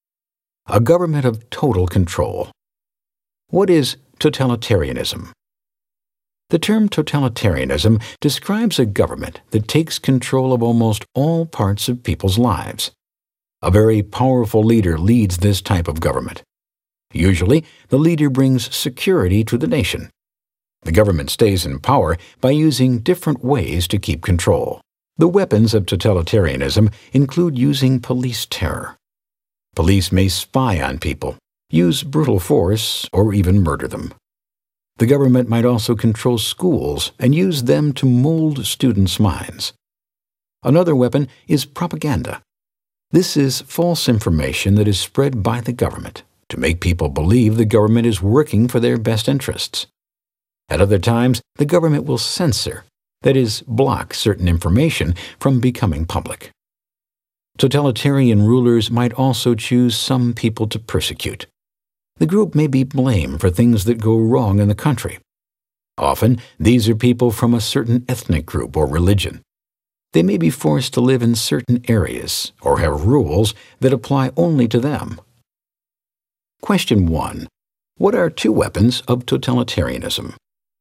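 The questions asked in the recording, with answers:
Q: What are two weapons of totalitarianism?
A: Police terror and propaganda (also censorship, persecution, controlling schools)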